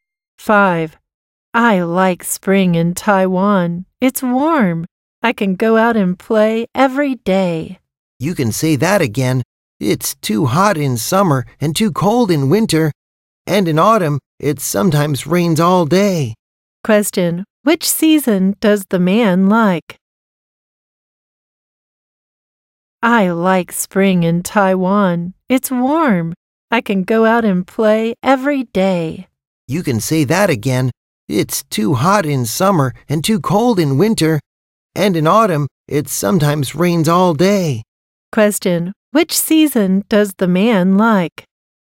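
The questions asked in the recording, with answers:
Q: Which season does the man like?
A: Spring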